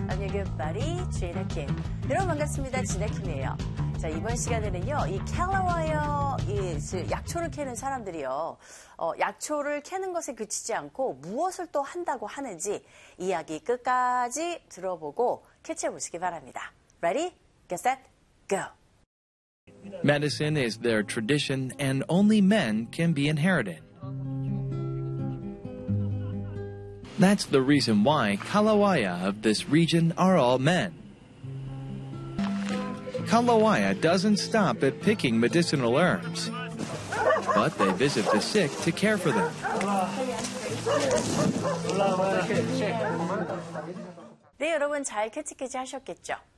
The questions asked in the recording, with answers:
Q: 이 캘러와이어, 이 약초를 캐는 사람들이요, 약초를 캐는 것에 그치지 않고 무엇을 또 한다고 하는지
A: they visit the sick to care for them.